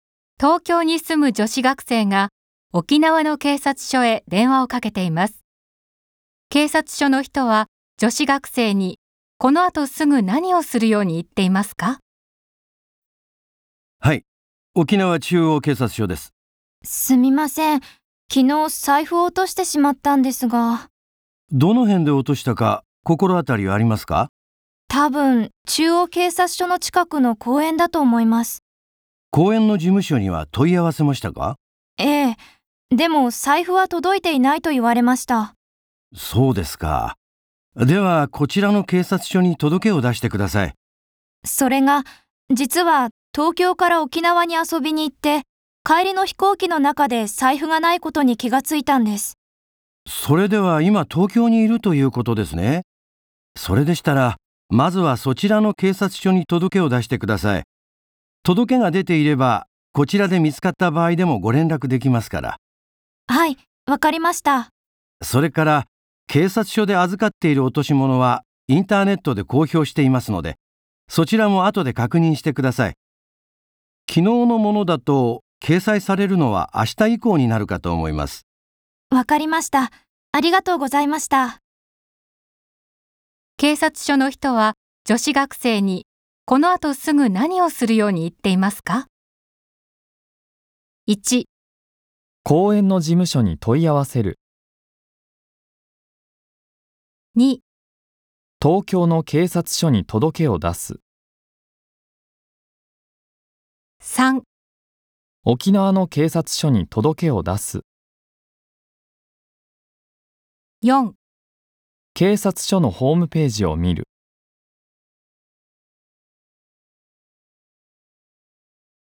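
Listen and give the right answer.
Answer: 2: 東京の警察署に届けを出す。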